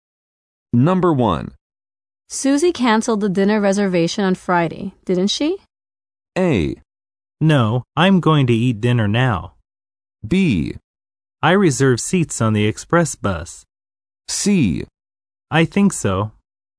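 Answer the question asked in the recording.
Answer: C: I think so.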